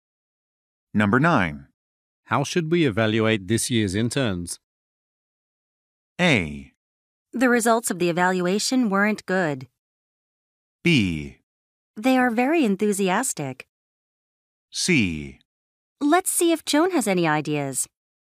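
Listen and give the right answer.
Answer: C: Let's see if Joan has any ideas.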